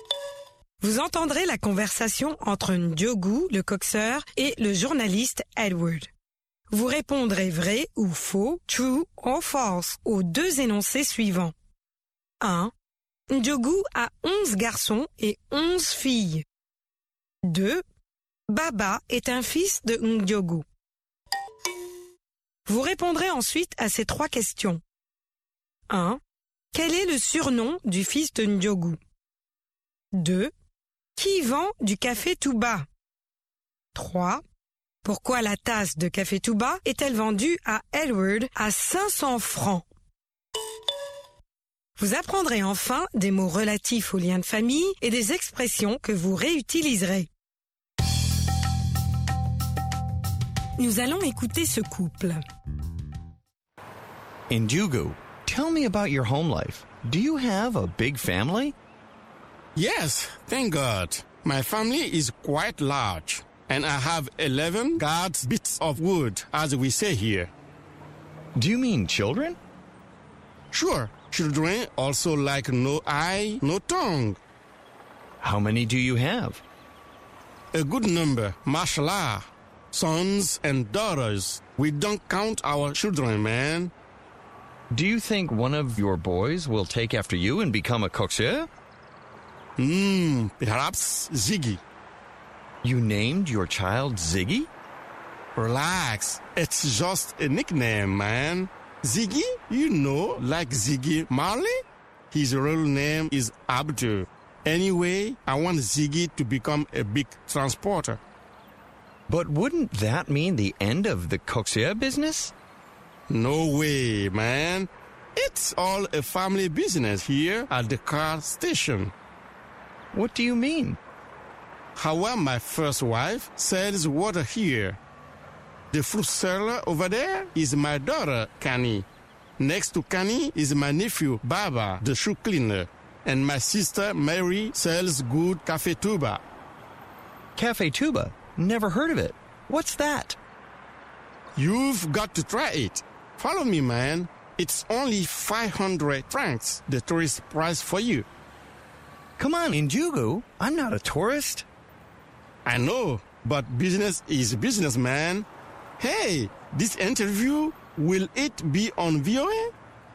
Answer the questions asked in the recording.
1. L'énoncé 1 est faux.
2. L'énoncé 2 est faux.
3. Ziggy.
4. Marie, la sœur de Ndiogou.
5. C'est le prix pour touristes.